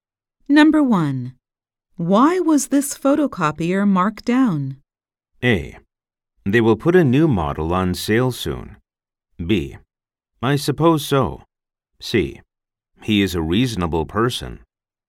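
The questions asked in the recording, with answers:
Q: Why was this photocopier marked down?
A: A: They will put a new model on sale soon.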